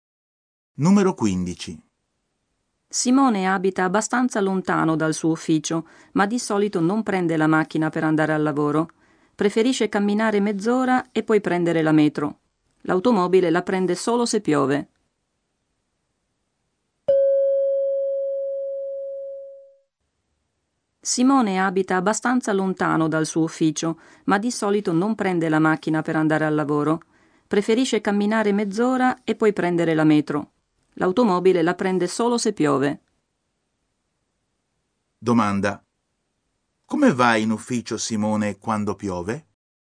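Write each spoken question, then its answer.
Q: Come va in ufficio Simone quando piove?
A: In macchina.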